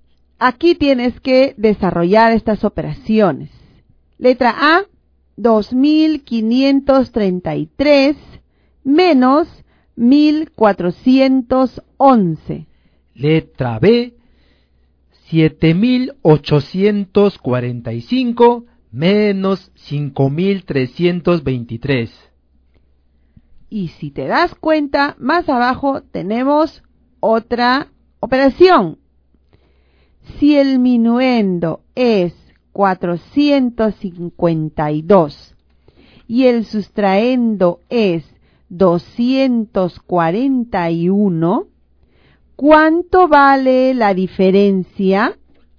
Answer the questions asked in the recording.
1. 1122.
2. 2522.
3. 211.